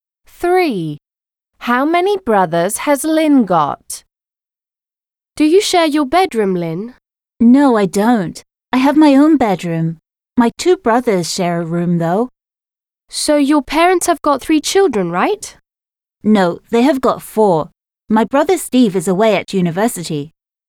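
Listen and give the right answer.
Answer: Three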